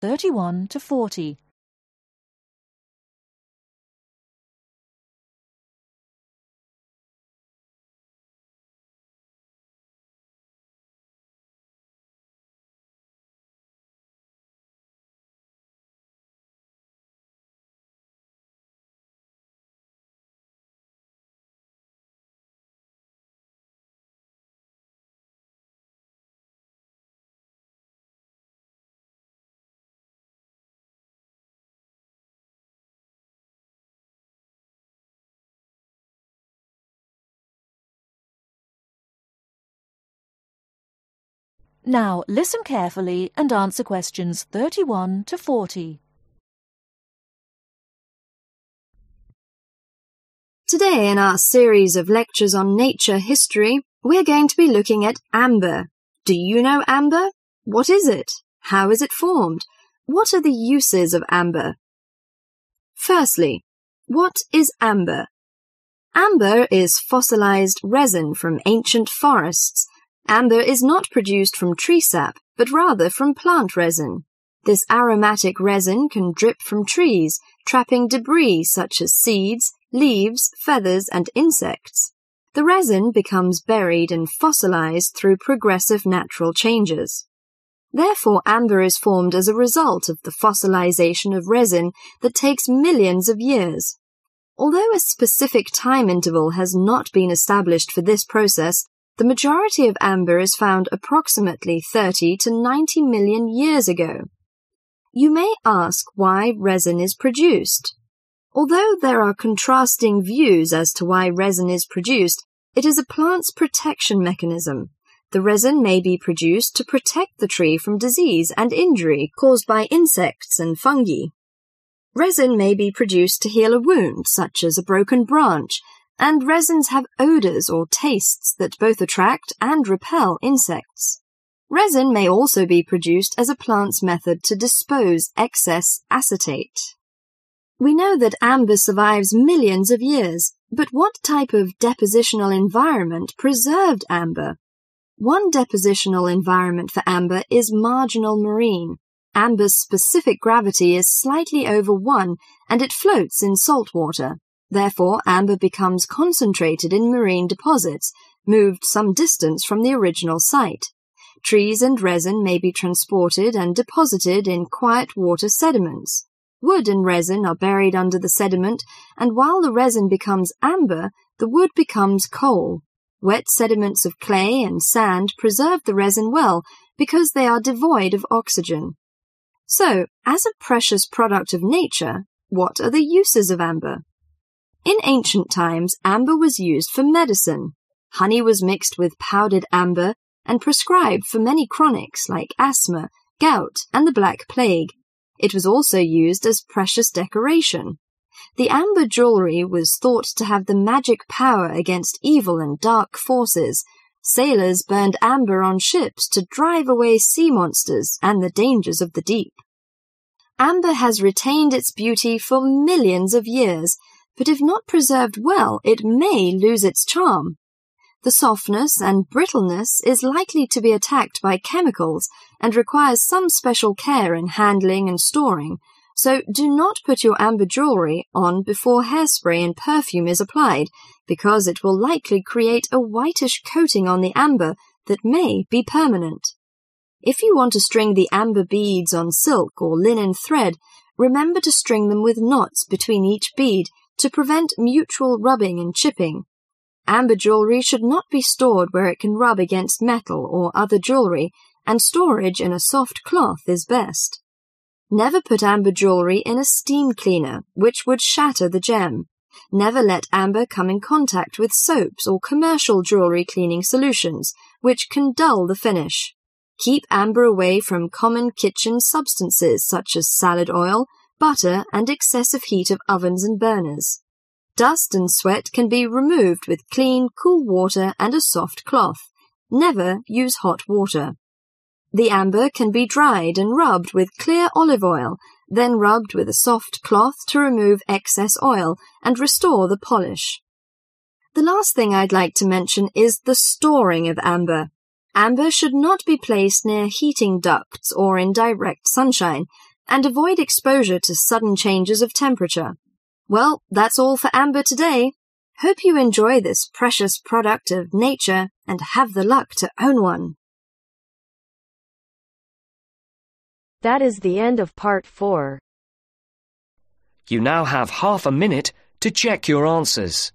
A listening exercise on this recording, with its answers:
Complete the summary below. Write ONE WORD ONLY for each answer.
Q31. It is a kind of (31) .......... resin, trapping debris like seeds and insects.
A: Fossilized

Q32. The majority of amber was formed about 30-90 (32) .......... years ago.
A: Million

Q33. To protect tress from (33) .......... and injury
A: Disease

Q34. To (34) .......... excess acetate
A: Dispose

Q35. Trees and resin were (35) .......... and deposited in quiet water sediments.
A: Transported

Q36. Used as medicine for chronica and precious (36) .......... .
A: Decoration

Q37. (37) .......... may attack the softness and brittleness of amber.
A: Chemicals

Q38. When stringing amber beads, do leave (38) .......... between each bead.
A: Knot

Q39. Remove dust and sweat with (39) .......... and (40) .......... water and soft cloth.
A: Clean

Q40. Remove dust and sweat with (39) .......... and (40) .......... water and soft cloth.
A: Cool